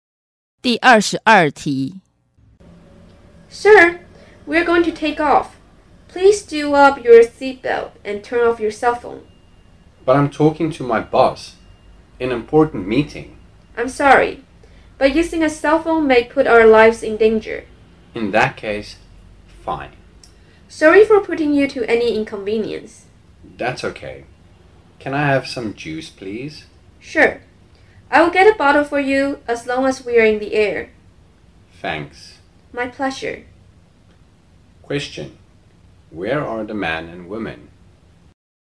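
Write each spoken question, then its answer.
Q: Where are the man and woman?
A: On a plane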